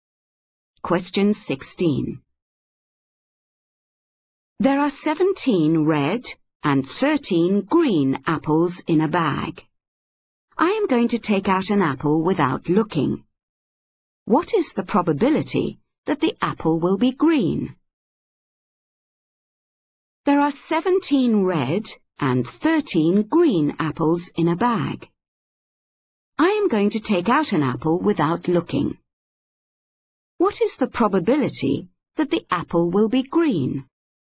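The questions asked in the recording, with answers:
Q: What is the probability that the apple will be green?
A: 13/30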